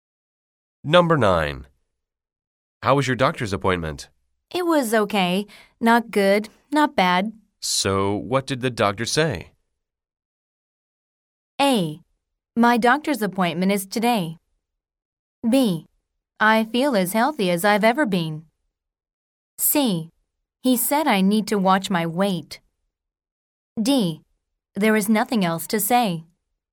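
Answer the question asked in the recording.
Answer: C: He said I need to watch my weight.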